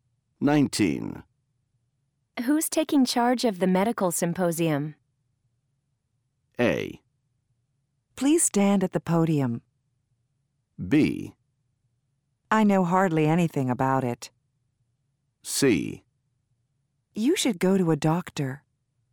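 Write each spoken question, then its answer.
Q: Who's taking charge of the medical symposium?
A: B: I know hardly anything about it.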